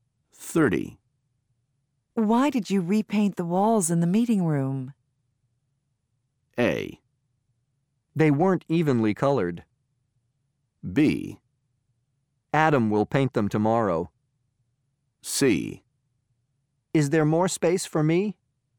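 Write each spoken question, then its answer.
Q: Why did you repaint the walls in the meeting room?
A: A: They weren't evenly colored.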